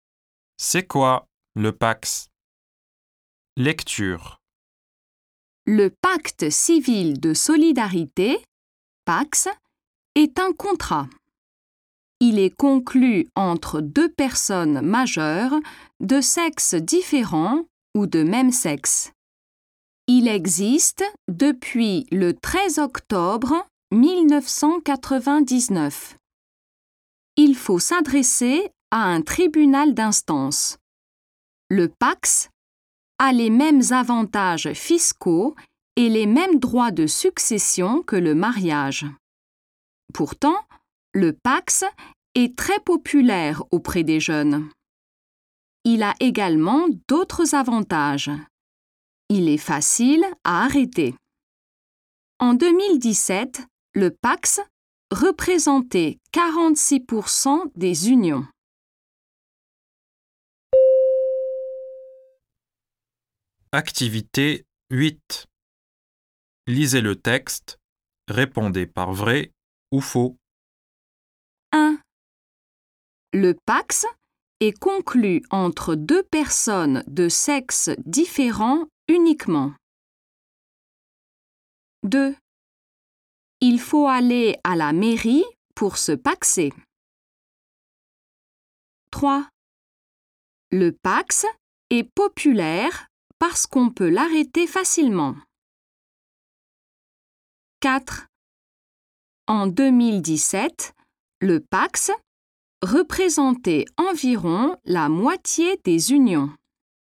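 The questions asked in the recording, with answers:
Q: Le Pax est conclu entre deux personnes de sexe différent uniquement.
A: Faux

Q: Il faut aller à la mairie pour se paxer.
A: Faux

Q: En 2017, le Pax représentait environ la moitié des unions.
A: Vrai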